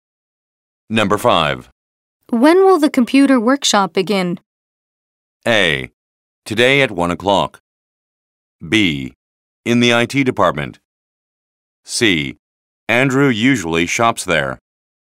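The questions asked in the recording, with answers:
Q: When will the computer workshop begin?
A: A: Today at 1 o'clock.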